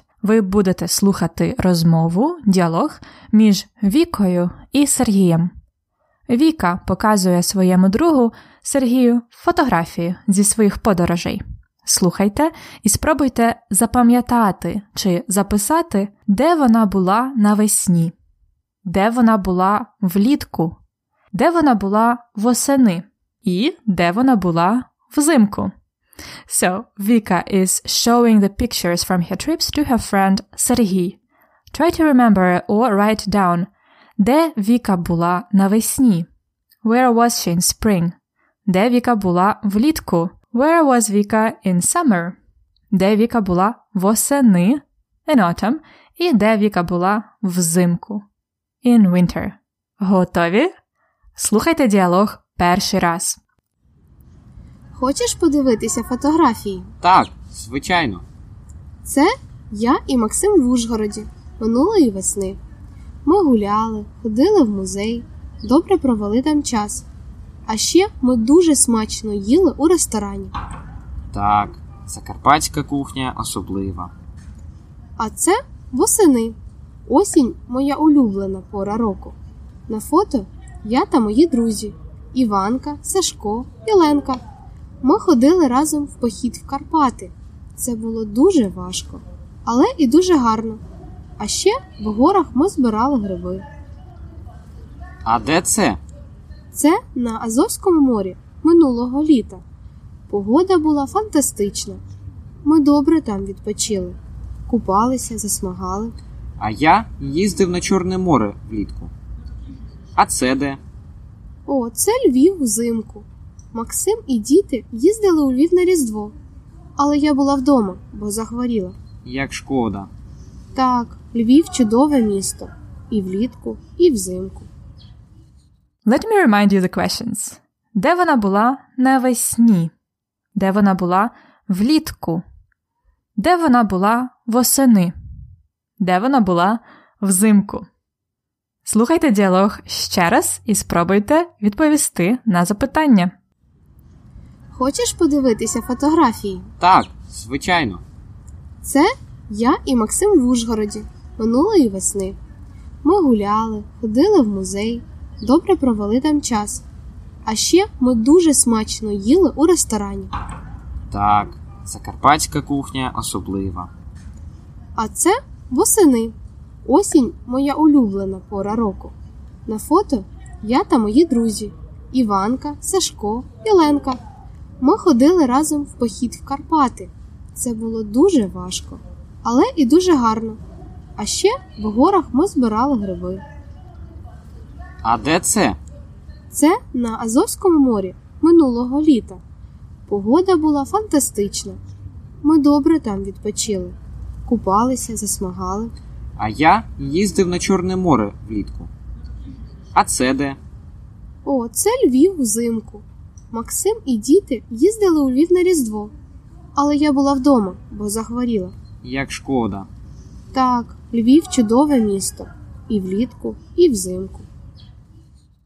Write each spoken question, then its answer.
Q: Де вона була навесні?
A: Навесні вона була в Ужгороді.

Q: Де вона була влітку?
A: Вона була на Азовському морі.

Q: Де вона була восени?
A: Вона була в Карпатах.

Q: Де вона була взимку?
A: Вона була вдома.